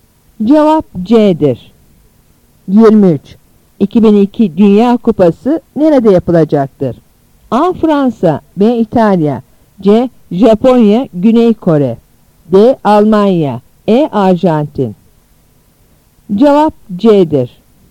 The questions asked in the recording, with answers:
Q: 2002 Dünya Kupası nerede yapılacaktır?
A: Cevap C'dir.